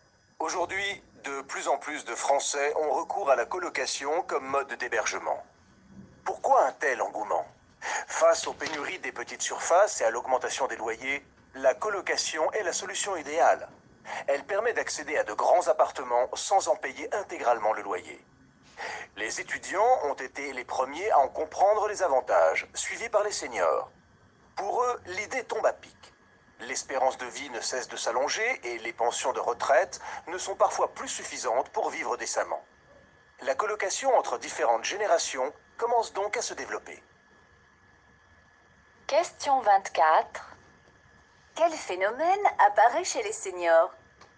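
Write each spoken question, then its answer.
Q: Quel phénomène apparaît chez les seniors?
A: La colocation entre différentes générations (colocation intergénérationnelle)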